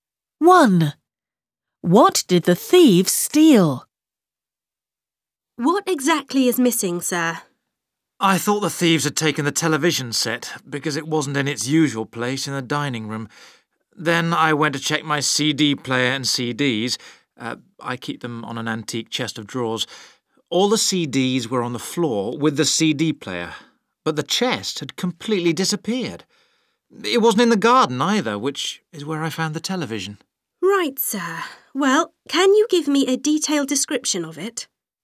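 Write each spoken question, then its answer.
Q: What did the thieves steal?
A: an antique chest of drawers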